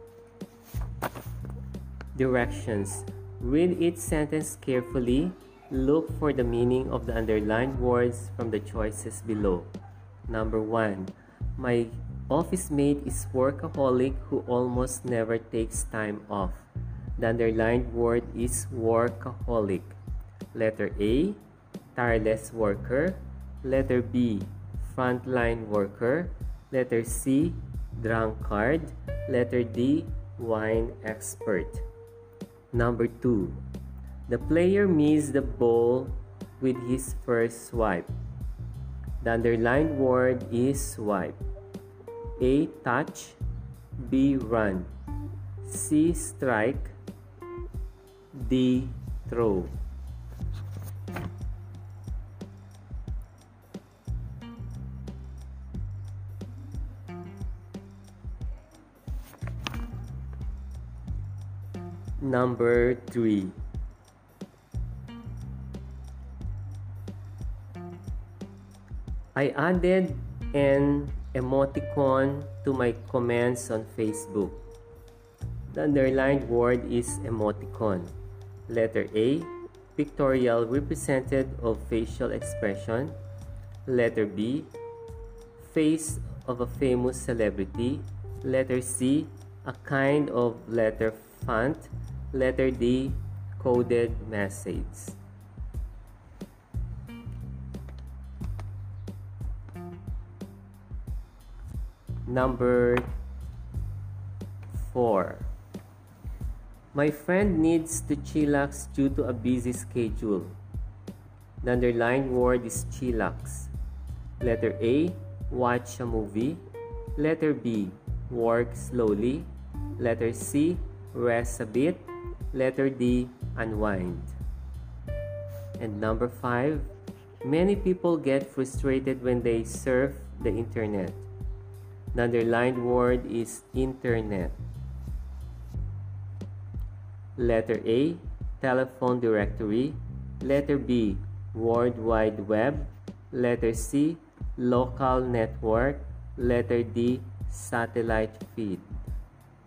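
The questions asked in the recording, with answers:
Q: Number one, my office mate is workaholic who almost never takes time off.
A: A: tireless worker

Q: Number two, the player missed the ball with his first swipe.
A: C: strike

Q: three. I added an emoticon to my comments on Facebook.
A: A: pictorial represented of facial expression

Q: And number five, many people get frustrated when they surf the internet.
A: B: World Wide Web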